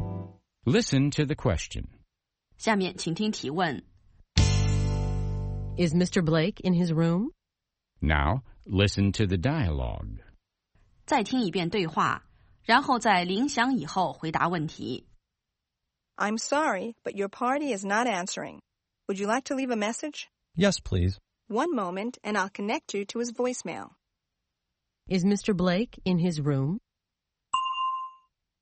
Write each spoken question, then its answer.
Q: Is Mr. Blake in his room?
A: No, he isn't.